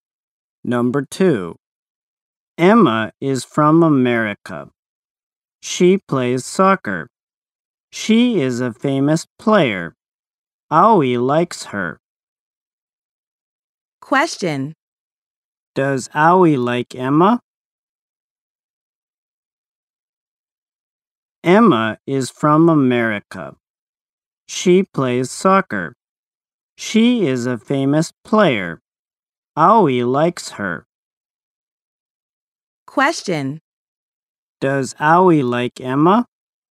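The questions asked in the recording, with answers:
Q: Does Owie like Emma?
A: Yes, he does.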